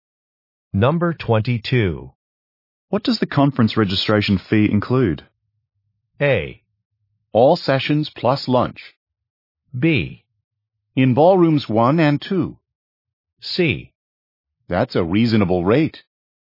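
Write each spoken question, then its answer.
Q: What does the conference registration fee include?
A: A: All sessions plus lunch.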